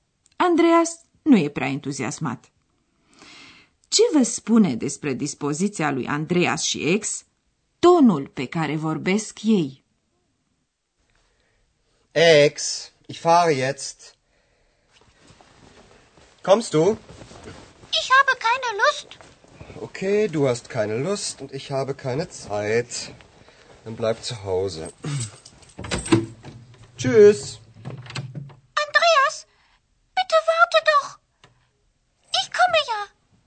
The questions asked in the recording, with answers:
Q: Ce vă spune despre dispoziția lui Andreas și ex tonul pe care vorbesc ei?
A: Ați remarcat, desigur, că atât Andreas cât și ex n-au niciun chef și că Andreas e cam enervat.